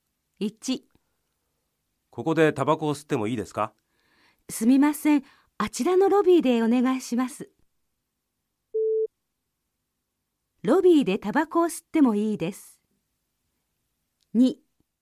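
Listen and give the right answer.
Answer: ○(正しい)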